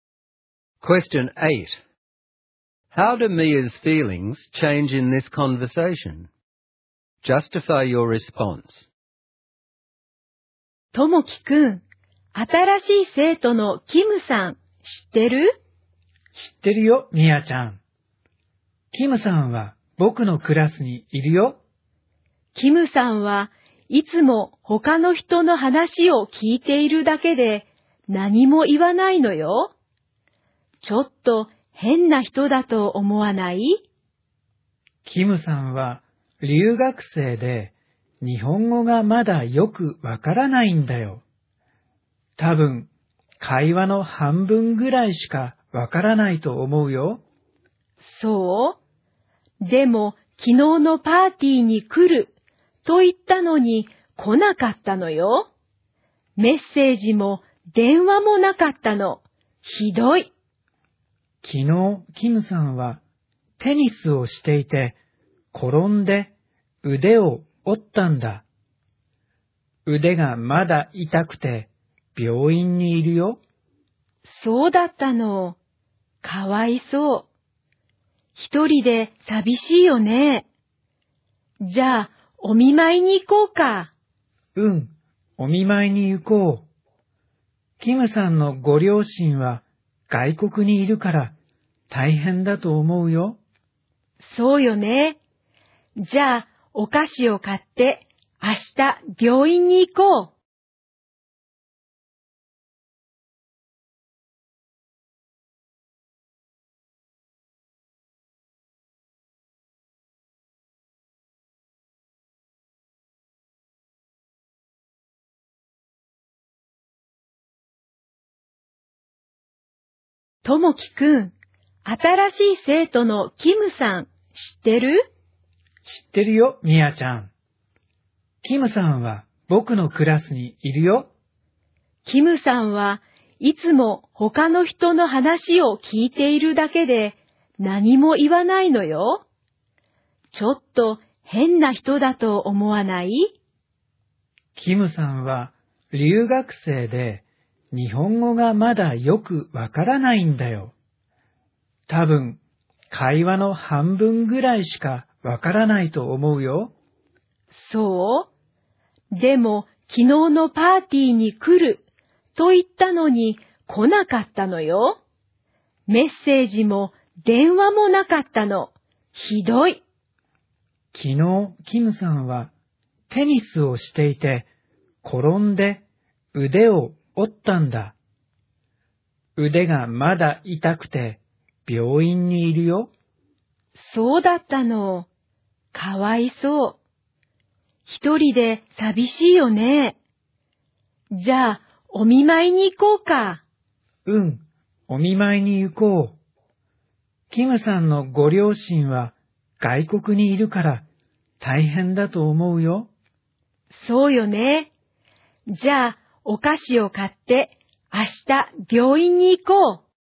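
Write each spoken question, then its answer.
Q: How do Mia's feelings change in this conversation?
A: At first she thinks Kim is strange and is angry that Kim didn't come to the party; then she feels sorry for Kim and wants to visit Kim in hospital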